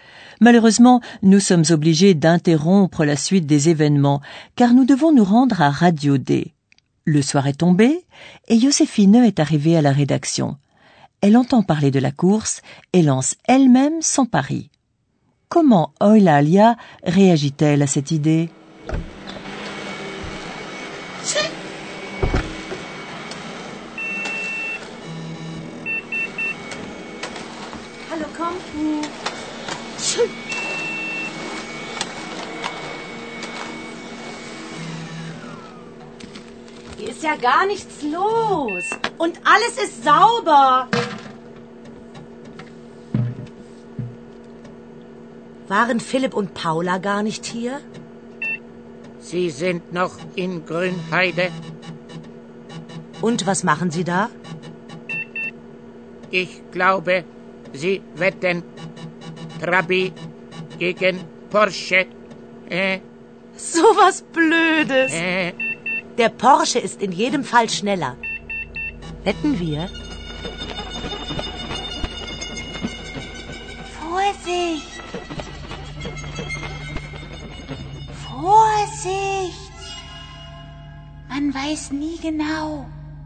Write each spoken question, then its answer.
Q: Comment Eulalia réagit-elle à cette idée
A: Eulalia appelle à la prudence, parce que, dit-elle, on ne sait jamais.